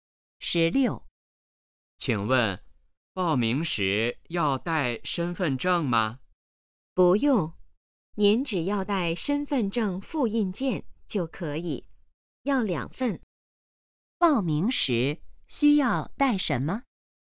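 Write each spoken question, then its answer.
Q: 报名时需要带什么?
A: 两份身份证复印件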